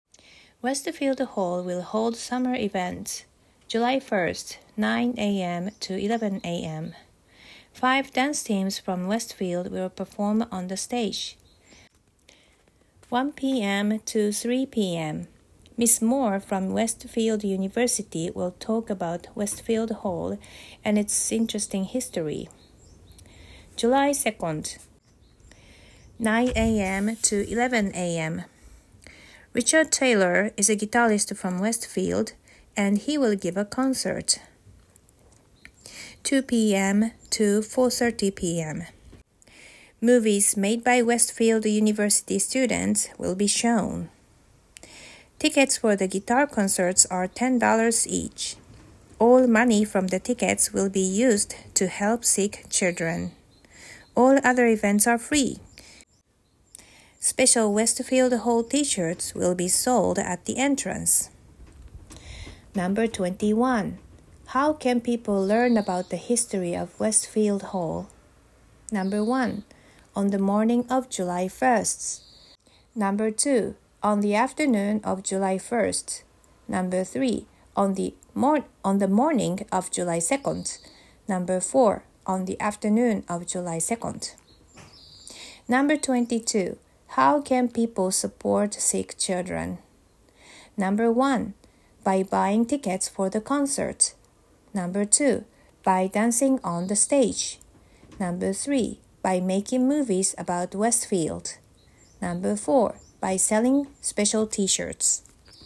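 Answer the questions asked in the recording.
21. 2: On the afternoon of July 1st.
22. 1: By buying tickets for the concert.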